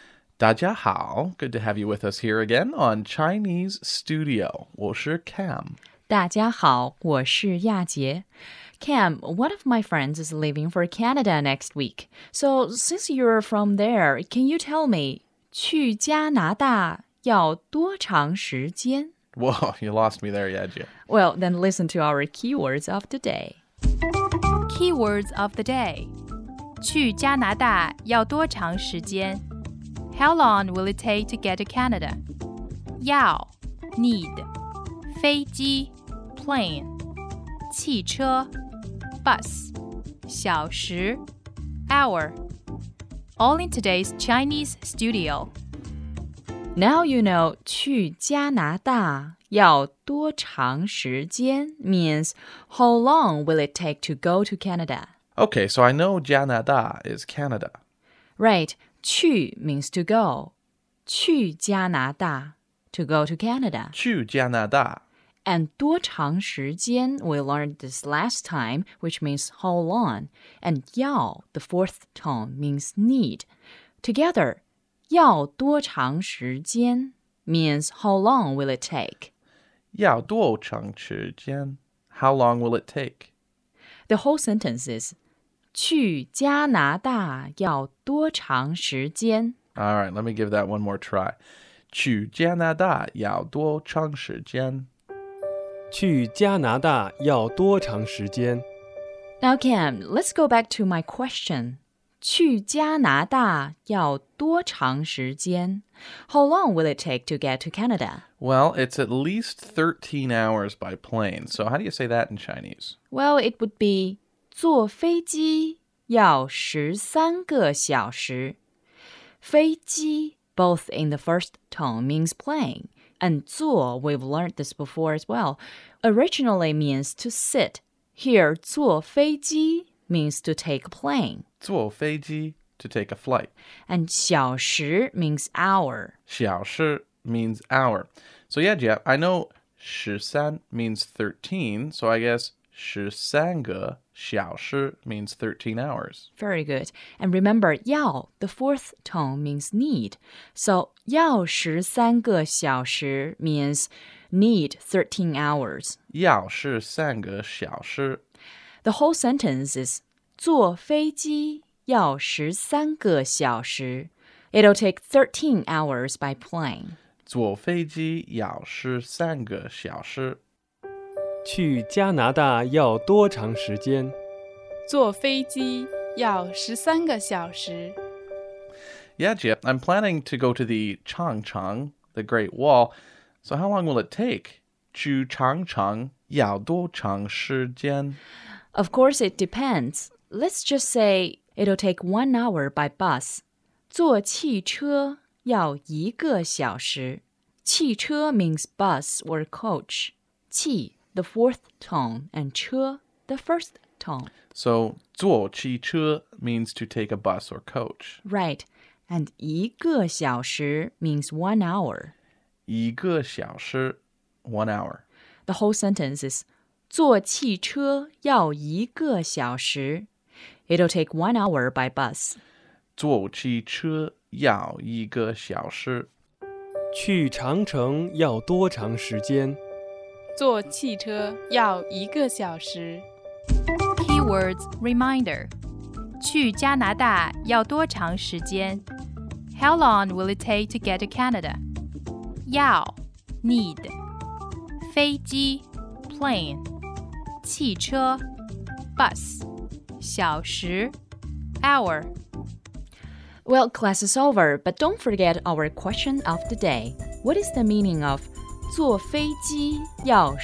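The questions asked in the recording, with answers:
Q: What is the meaning of 坐飞机要13个小时?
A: It'll take 13 hours by plane.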